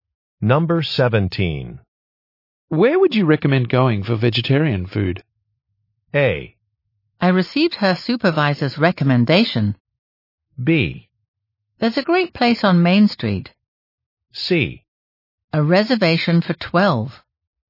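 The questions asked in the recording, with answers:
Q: Where would you recommend going for vegetarian food?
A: B: There's a great place on Main Street.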